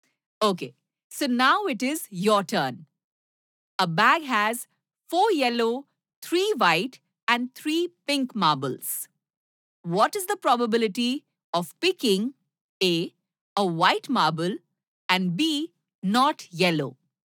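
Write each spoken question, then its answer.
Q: What is the probability of picking A, a white marble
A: 3/10

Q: and B, not yellow?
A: 6/10 = 3/5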